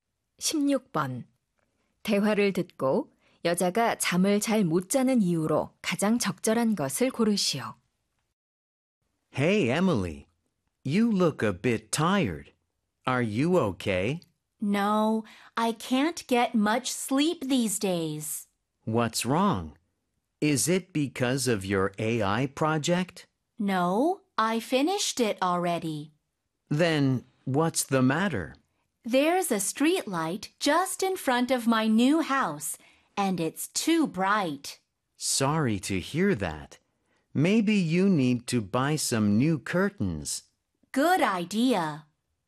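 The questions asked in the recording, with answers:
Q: 대화를 듣고 여자가 잠을 잘 못 자는 이유로 가장 적절한 것을 고르시오.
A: 집 앞 가로등이 너무 밝아서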